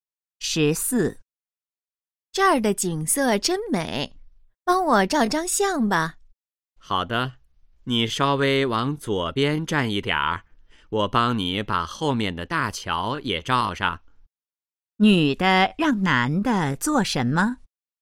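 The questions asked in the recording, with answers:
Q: 女的让男的做什么?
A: 帮她照相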